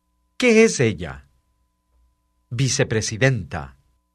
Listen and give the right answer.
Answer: Ella es vicepresidenta.